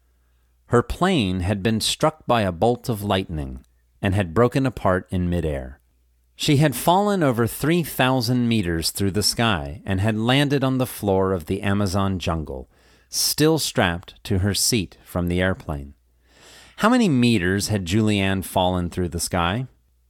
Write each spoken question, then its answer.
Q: How many meters had Julianne fallen through the sky?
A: She had fallen over 3,000 meters through the sky.